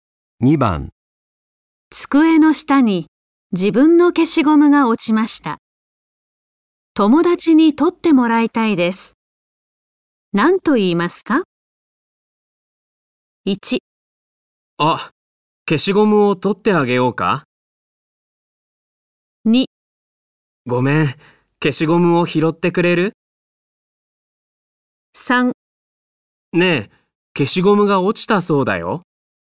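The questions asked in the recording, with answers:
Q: 何と言いますか?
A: 2: ごめん、消しゴムを拾ってくれる?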